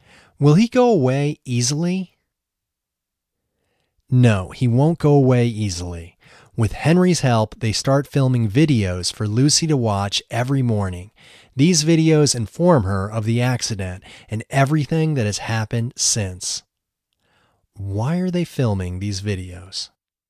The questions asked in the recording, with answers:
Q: Why are they filming these videos?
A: They are filming these videos to inform Lucy about her accident and everything that has happened since.